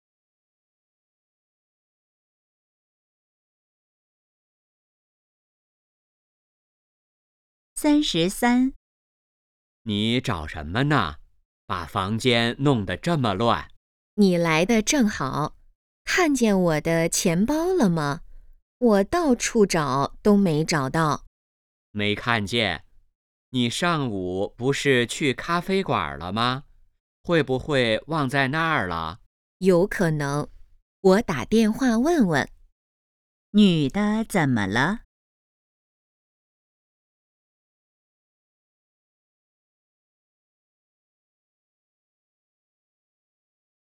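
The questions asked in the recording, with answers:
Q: 女的怎么了?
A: 钱包找不到了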